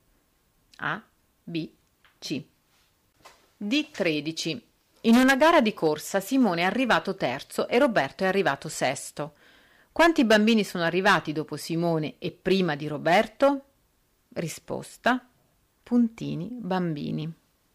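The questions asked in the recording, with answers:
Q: Quanti bambini sono arrivati dopo Simone e prima di Roberto?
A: 2 bambini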